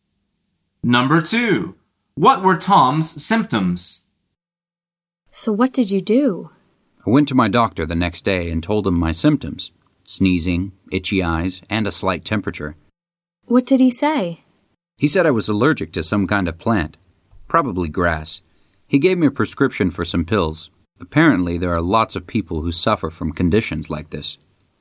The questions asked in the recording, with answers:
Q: What were Tom's symptoms?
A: The answer is he was sneezing.